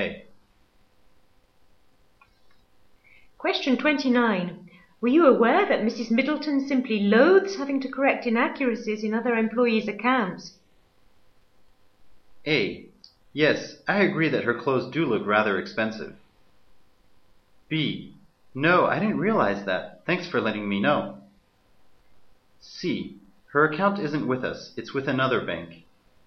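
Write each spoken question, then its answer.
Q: Were you aware that Mrs. Middleton simply loathes having to correct inaccuracies in other employees' accounts?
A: B: No, I didn't realize that. Thanks for letting me know.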